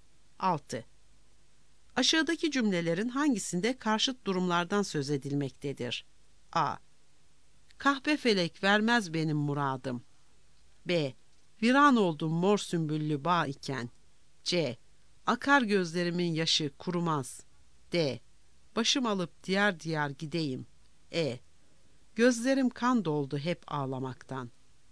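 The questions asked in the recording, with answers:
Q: Aşağıdaki cümlelerin hangisinde karşıt durumlardan söz edilmektedir?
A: B: Viran oldum mor sümbüllü bağ iken.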